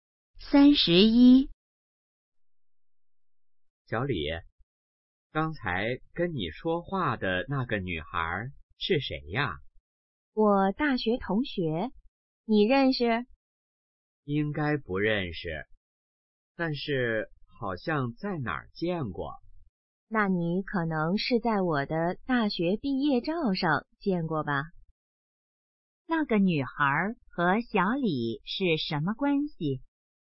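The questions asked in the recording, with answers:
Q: 那个女孩和小李是什么关系?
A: 大学同学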